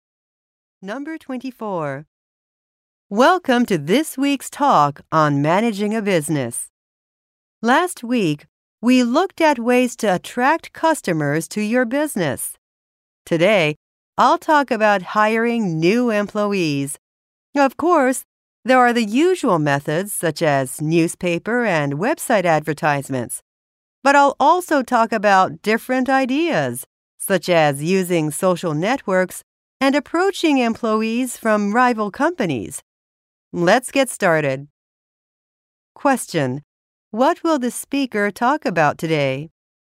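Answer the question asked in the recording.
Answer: Ways to hire new employees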